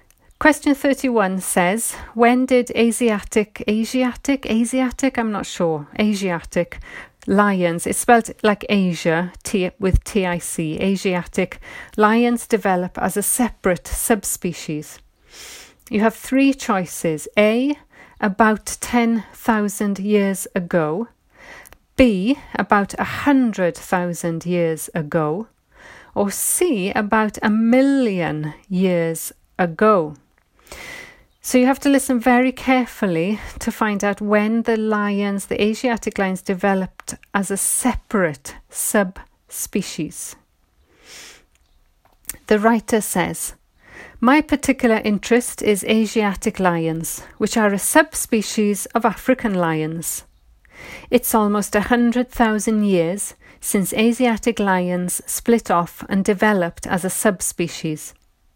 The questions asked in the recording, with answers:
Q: when did Asiatic, Asiatic, Asiatic, I'm not sure, Asiatic lions, it's spelled like Asia T, with TIC, Asiatic, lions develop as a separate subspecies?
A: So the answer is B, 100,000 years ago.